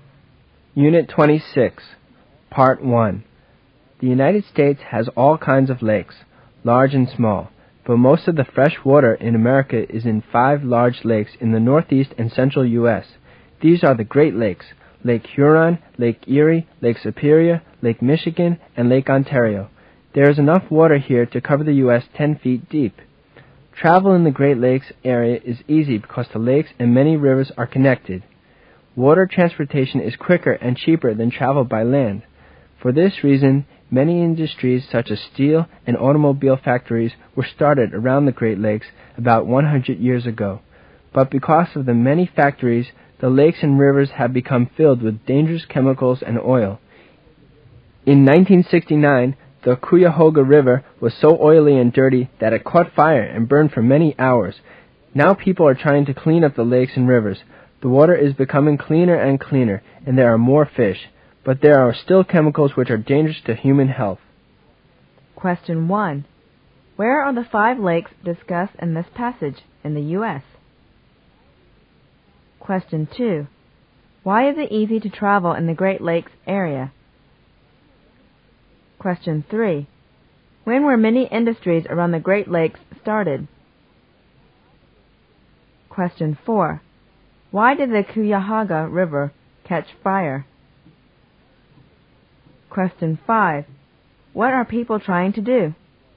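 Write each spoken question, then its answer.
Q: Where are the 5 lakes discussed in this passage in the U.S.?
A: In the northeast and central U.S.

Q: Why is it easy to travel in the Great Lakes area?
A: The lakes and many rivers are connected

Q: When were many industries around the Great Lakes started?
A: About 100 years ago

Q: Why did the Cuyahoga River catch fire?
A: It was so oily and dirty

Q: What are people trying to do?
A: Clean up the lakes and rivers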